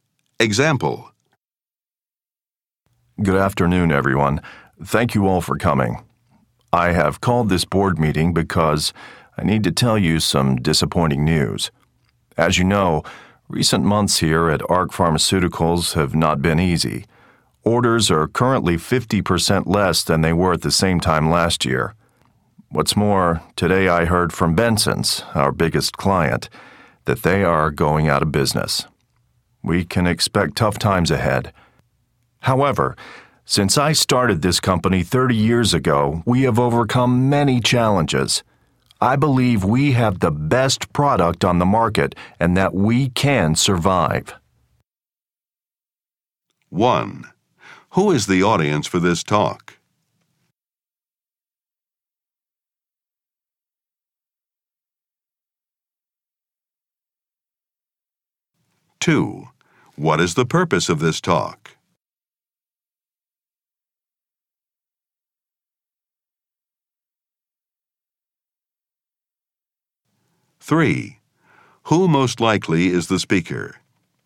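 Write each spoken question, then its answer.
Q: Who is the audience for this talk?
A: The company's board members

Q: What is the purpose of this talk?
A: To share disappointing news about the company's business

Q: Who most likely is the speaker?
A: The company's founder (head of ARC Pharmaceuticals)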